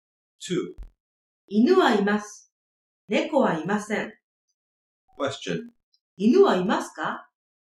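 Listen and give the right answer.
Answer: はい、います。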